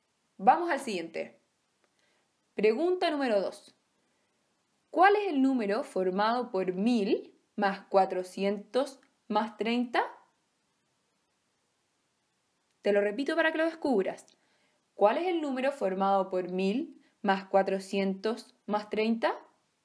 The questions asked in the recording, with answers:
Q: ¿Cuál es el número formado por 1000 más 400 más 30?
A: Muy bien, es el número 1430.